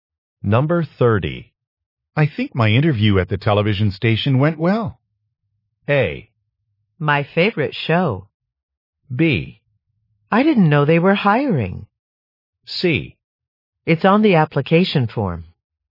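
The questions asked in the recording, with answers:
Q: I think my interview at the television station went well.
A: B: I didn't know they were hiring.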